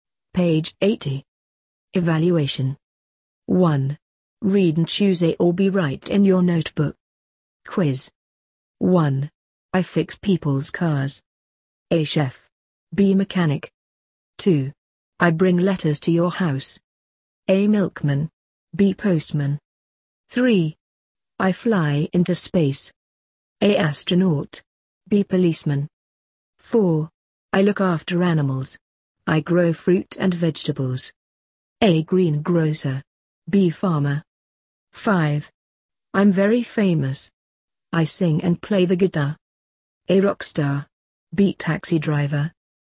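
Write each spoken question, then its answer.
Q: I fix people's cars.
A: B: Mechanic

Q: I bring letters to your house.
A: B: Postman

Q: I fly into space.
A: A: Astronaut

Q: I'm very famous. I sing and play the guitar.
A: A: Rockstar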